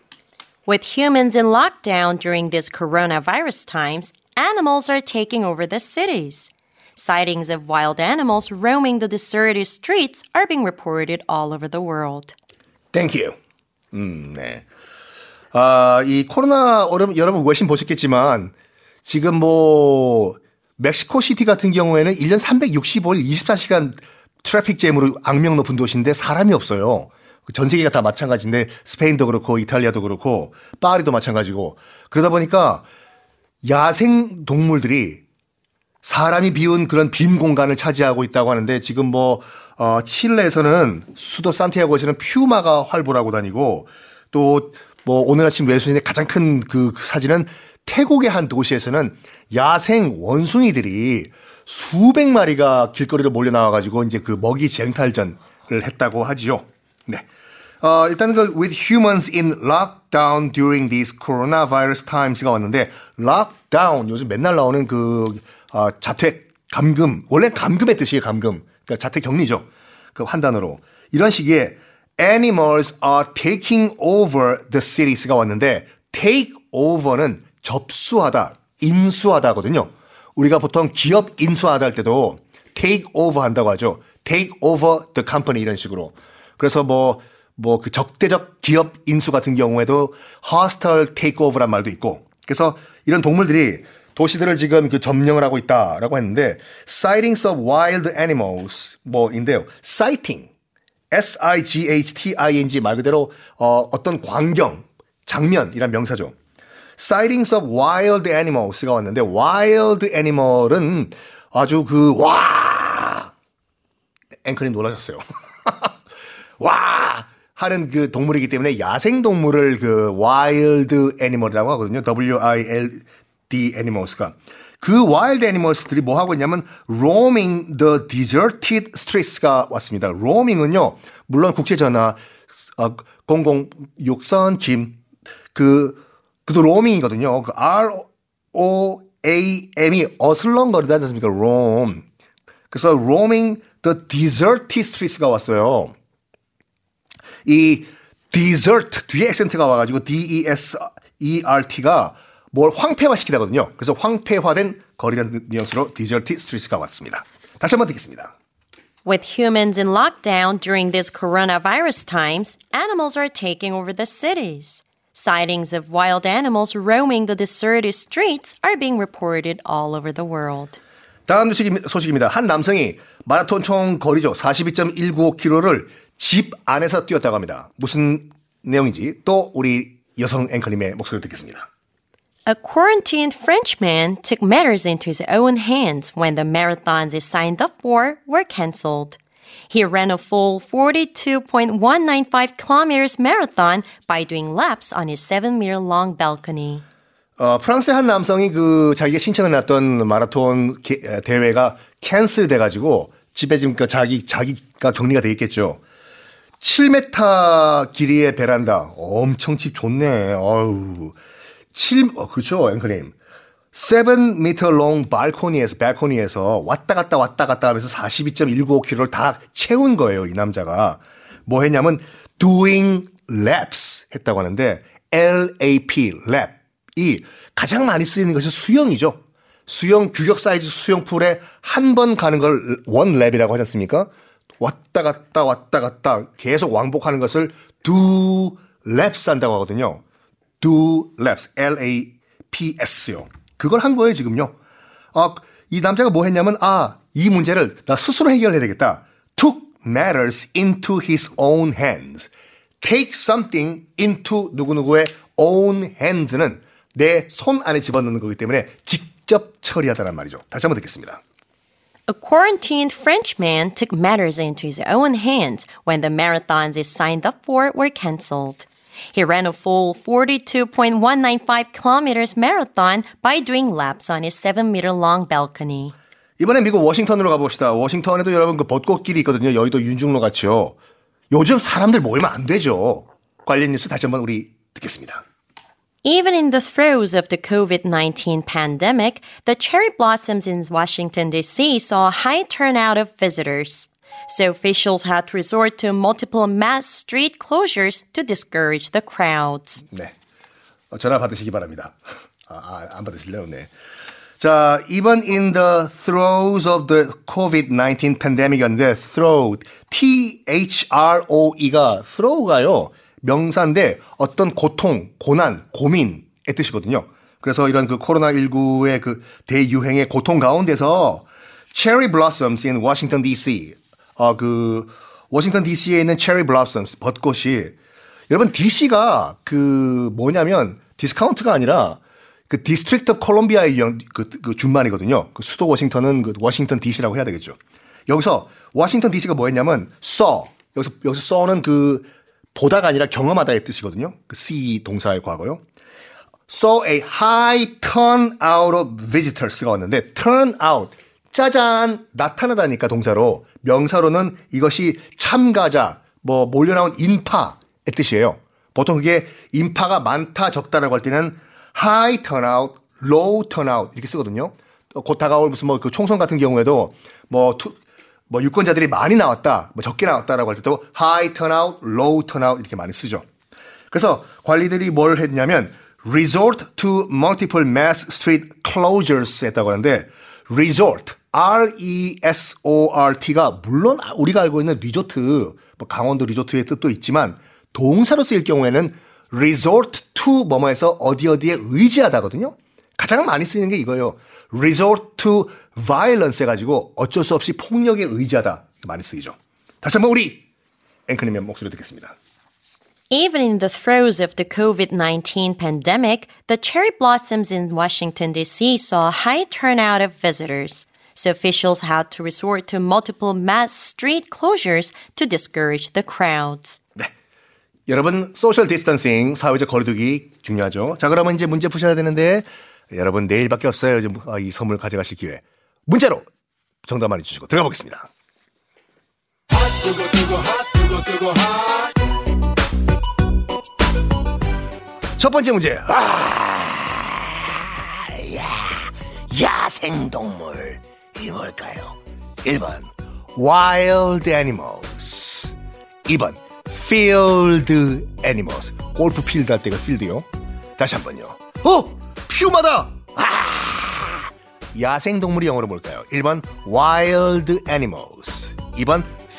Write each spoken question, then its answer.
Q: 야생동물이 영어로 뭘까요?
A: 당연히 1번 와일드 애니멀이 야생동물이죠.